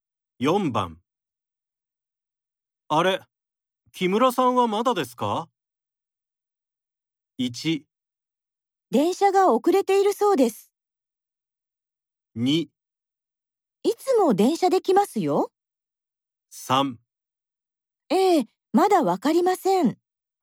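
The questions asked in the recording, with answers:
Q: あれ、木村さんはまだですか?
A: 1: 電車が遅れているそうです。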